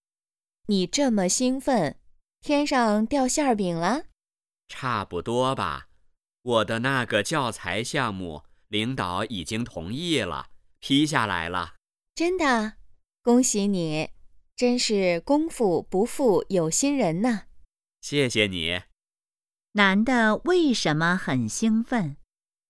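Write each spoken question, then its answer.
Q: 男的为什么很兴奋?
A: 他的教材项目被领导批准了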